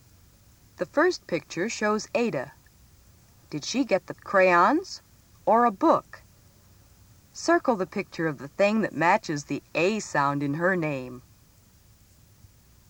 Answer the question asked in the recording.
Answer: You should have circled the crayons.